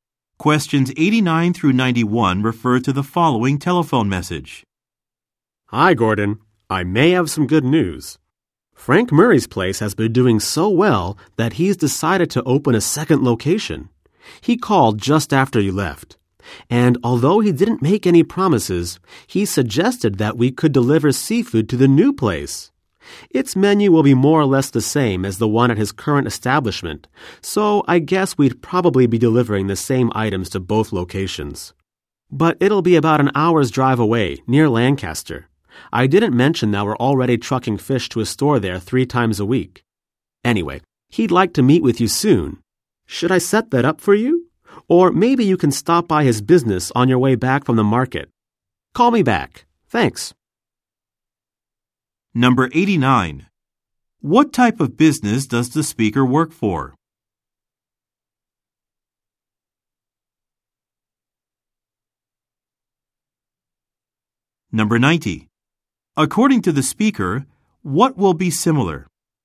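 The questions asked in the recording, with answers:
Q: What type of business does the speaker work for?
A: A seafood supplier

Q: According to the speaker, what will be similar?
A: The menus of the two restaurant locations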